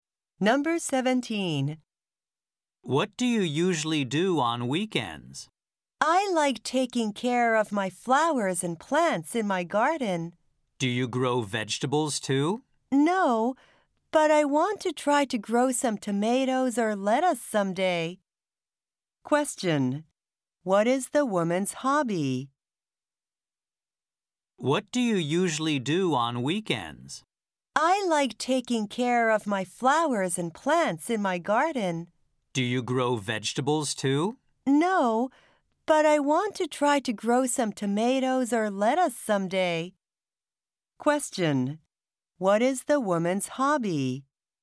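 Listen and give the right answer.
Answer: Gardening (taking care of flowers and plants)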